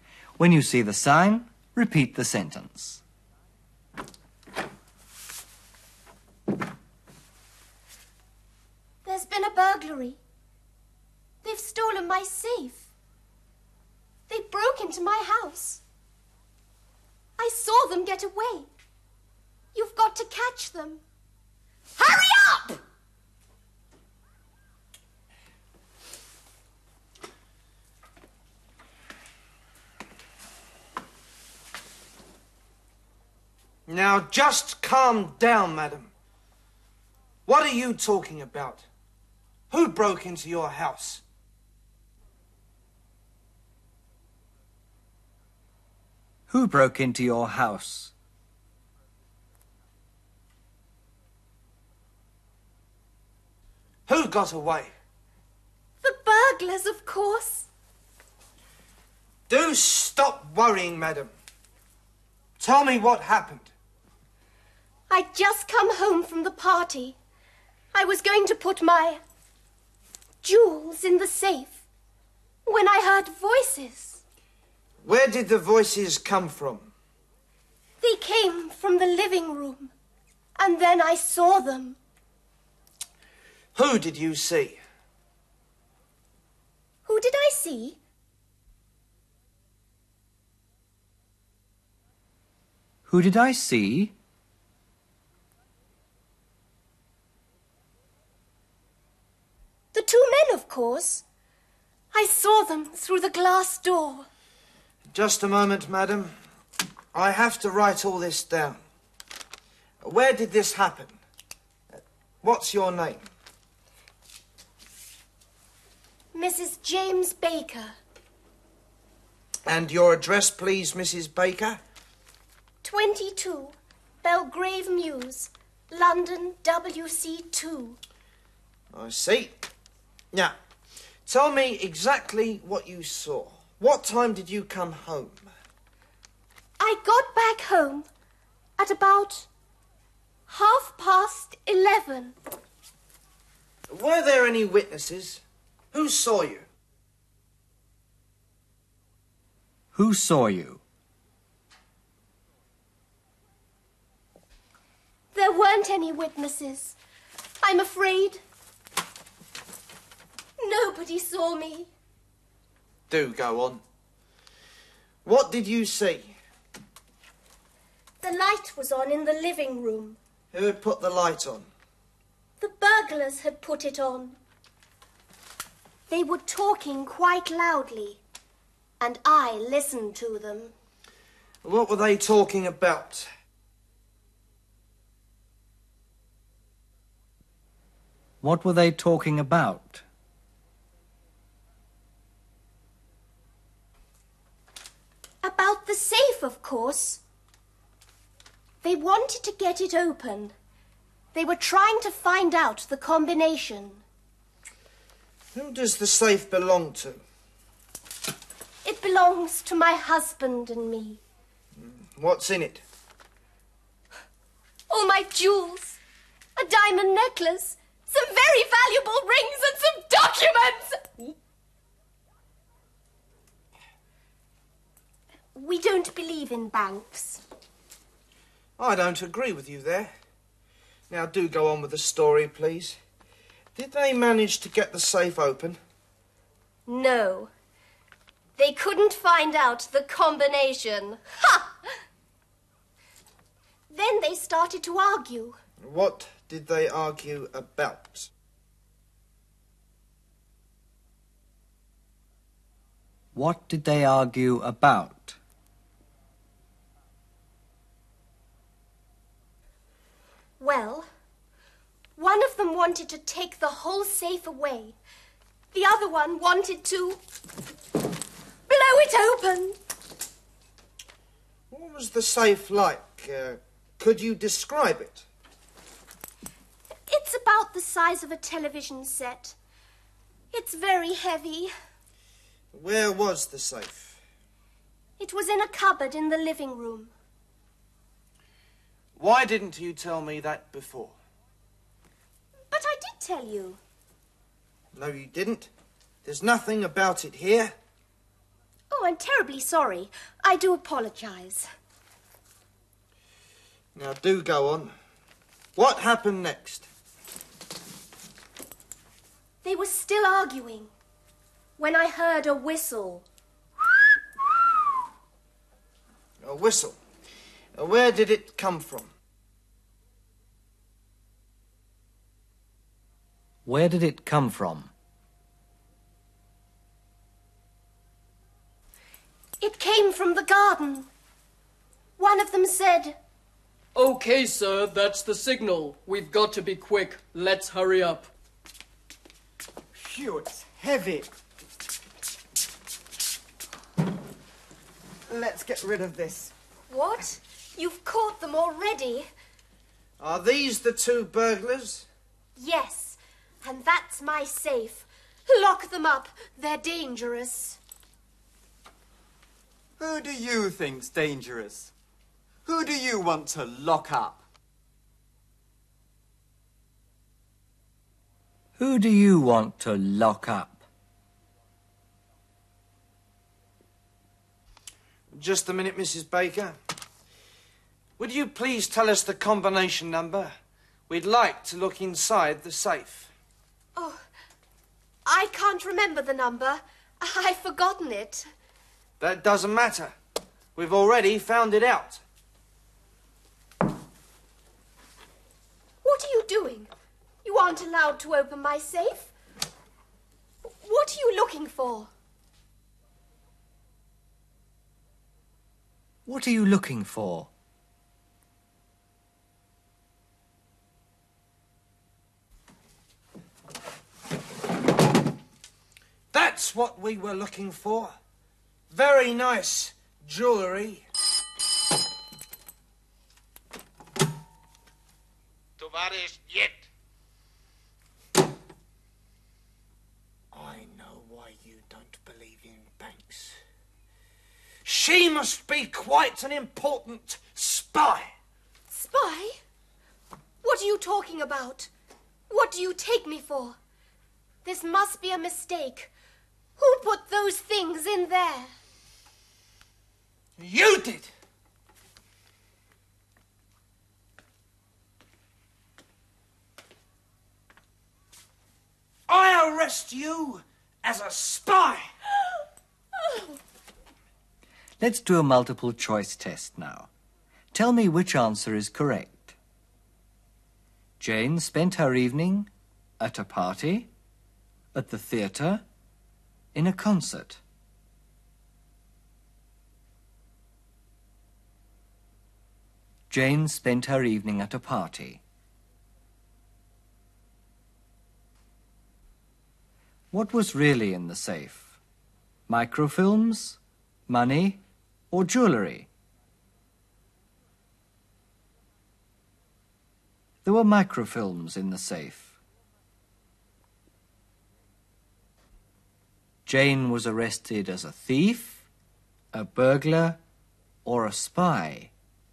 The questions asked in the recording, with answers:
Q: Jane spent her evening at a party, at the theatre, in a concert.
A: Jane spent her evening at a party.

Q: What was really in the safe? Microfilms, money, or jewellery?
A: There were microfilms in the safe.

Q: Jane was arrested as a thief, a burglar, or a spy.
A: She was arrested as a spy.